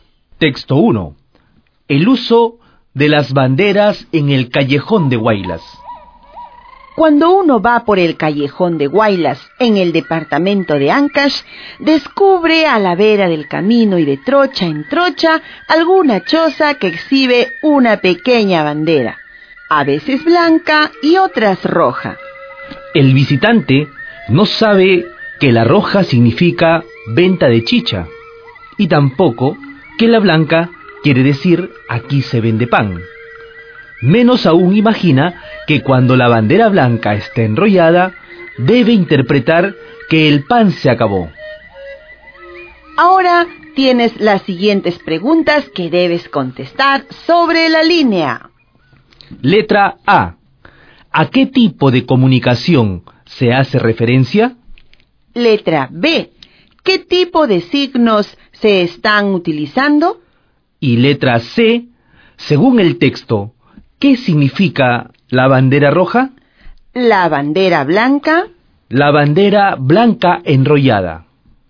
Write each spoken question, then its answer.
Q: según el texto, ¿qué significa la bandera roja?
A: Significa que se vende chicha o que hay venta de chicha.

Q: La bandera blanca.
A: Que hay venta de pan.

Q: La bandera blanca enrollada.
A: Que se acabó el pan.